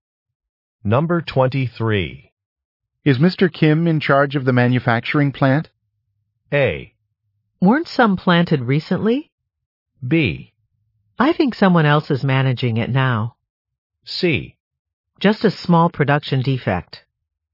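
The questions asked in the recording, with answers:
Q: Is Mr. Kim in charge of the manufacturing plant?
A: B: I think someone else is managing it now.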